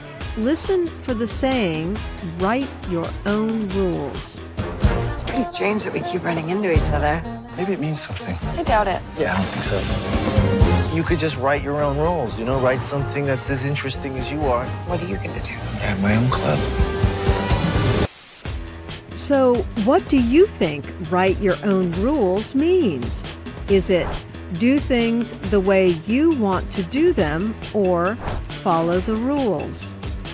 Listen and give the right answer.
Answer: Write your own rules means do things the way you want to do them.